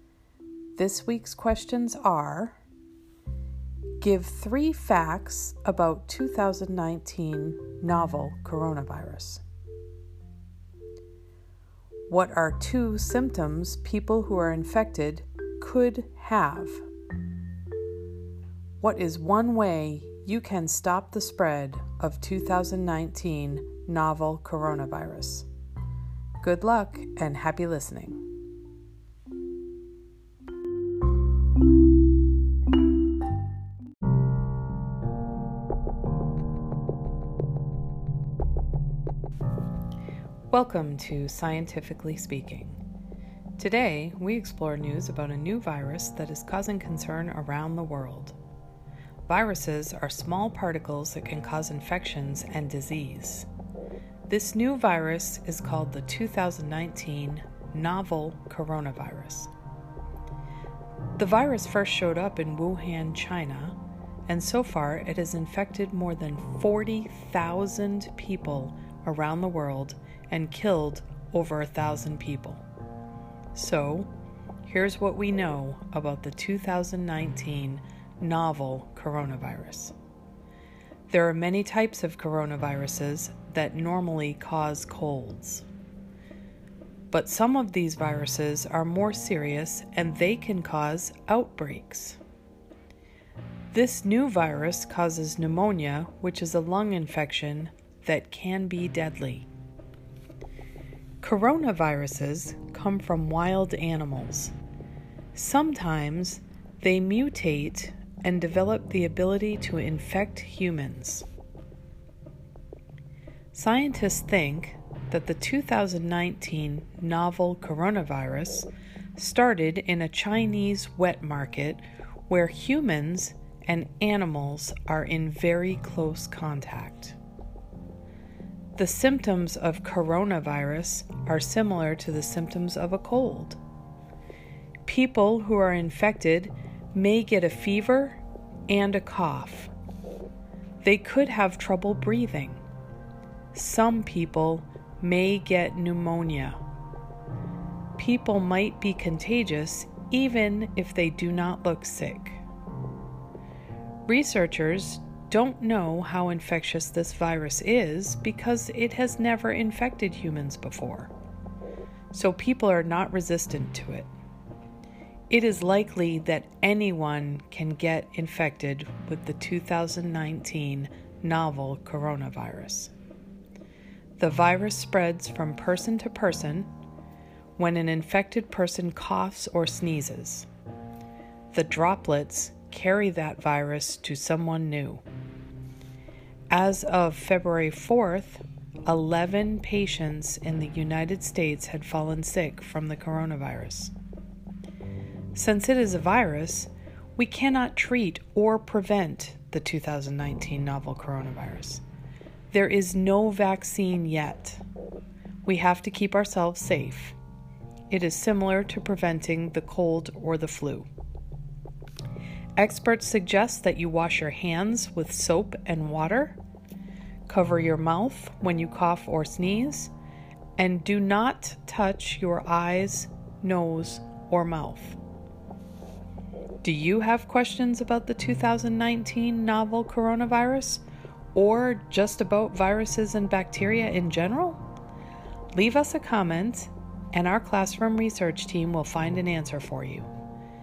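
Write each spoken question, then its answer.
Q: What are two symptoms people who are infected could have?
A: Fever and cough

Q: What is one way you can stop the spread of 2019 novel coronavirus?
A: Wash your hands with soap and water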